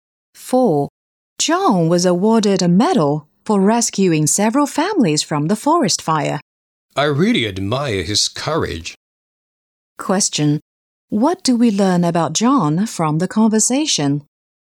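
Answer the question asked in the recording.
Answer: He is brave; he rescued families from a forest fire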